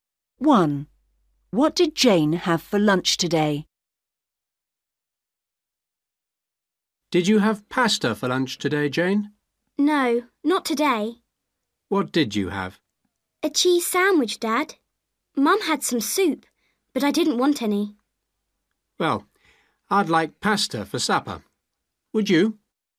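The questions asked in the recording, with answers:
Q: What did Jane have for lunch today?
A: A cheese sandwich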